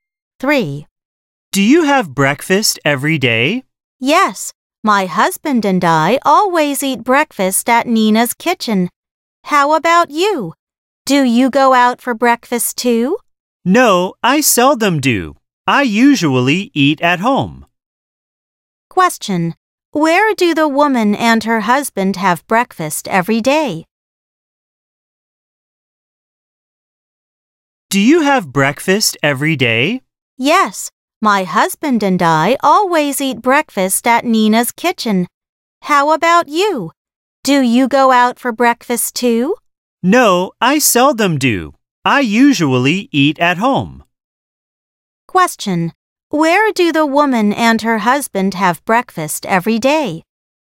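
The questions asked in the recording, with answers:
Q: Where do the woman and her husband have breakfast every day?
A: At Nina's kitchen.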